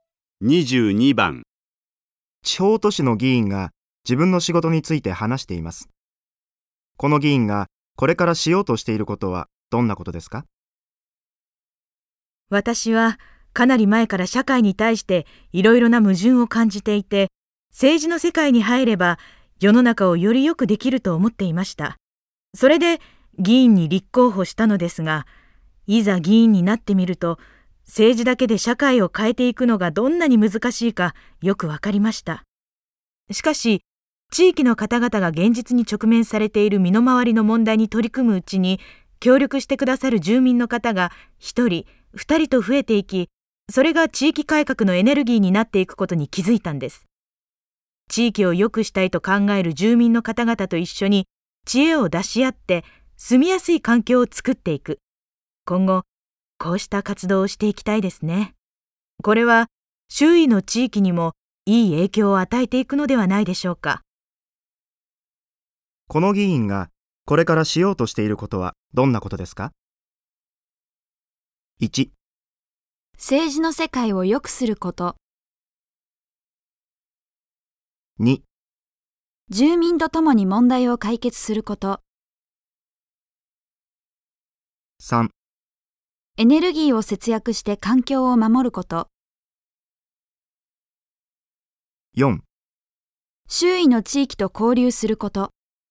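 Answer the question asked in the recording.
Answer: 2: 住民と共に問題を解決すること。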